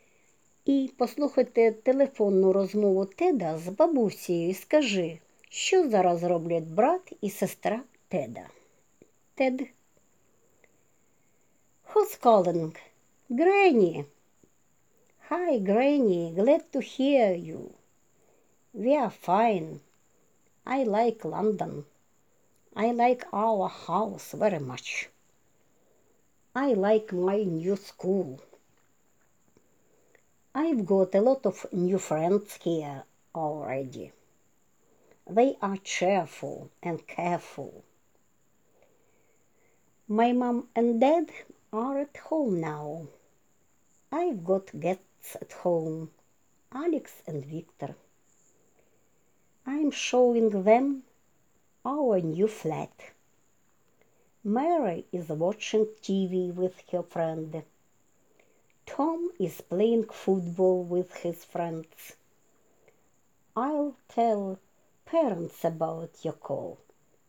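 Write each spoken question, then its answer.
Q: І послухайте телефонну розмову Теда з бабусею і скажи, що зараз роблять брат і сестра Теда.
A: Мері дивиться телевізор з подругою, Том грає у футбол з друзями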